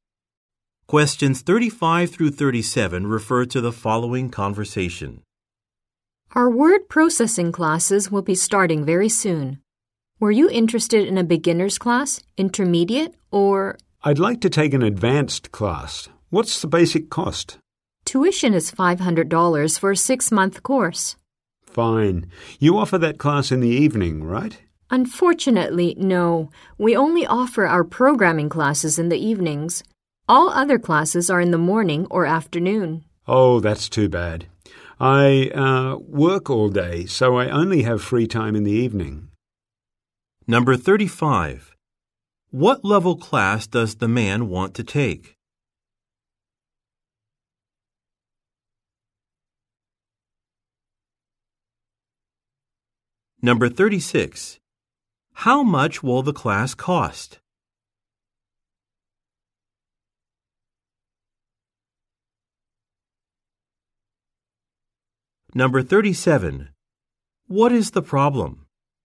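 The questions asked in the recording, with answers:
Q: What level class does the man want to take?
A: Advanced

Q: How much will the class cost?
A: $500

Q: What is the problem?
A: The class is not offered in the evening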